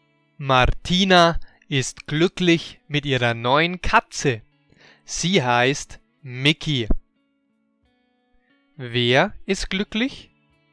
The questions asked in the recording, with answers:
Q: Wer ist glücklich?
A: Martina. Sie ist glücklich.